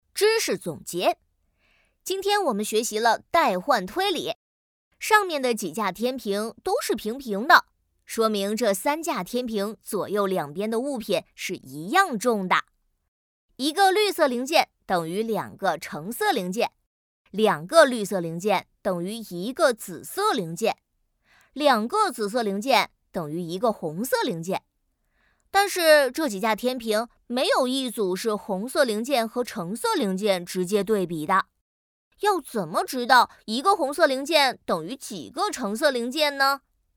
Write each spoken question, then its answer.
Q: 要怎么知道一个红色零件等于几个橙色零件呢?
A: 两个紫色零件可以换成八个橙色零件